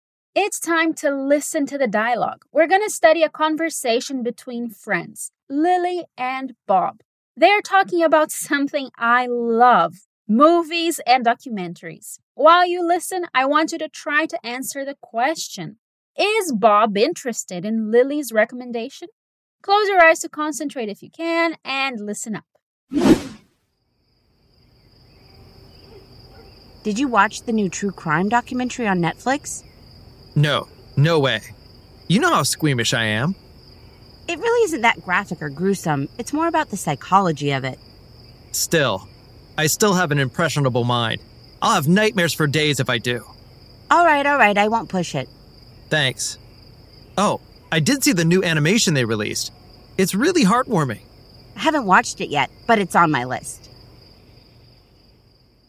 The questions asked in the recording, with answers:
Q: Is Bob interested in Lily's recommendation?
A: Okay, so he is not very interested in this recommendation.